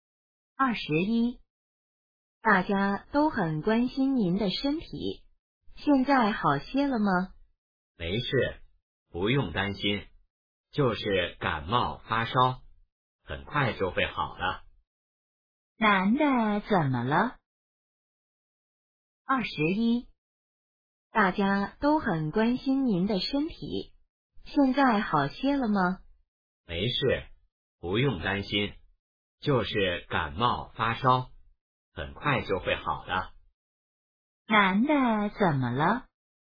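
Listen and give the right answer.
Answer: 感冒发烧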